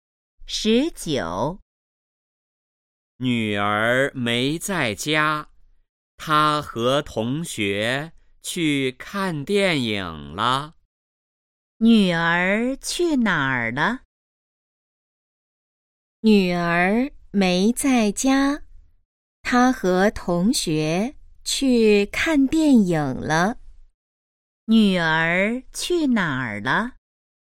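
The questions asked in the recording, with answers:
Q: 女儿去哪儿了?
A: 和同学去看电影了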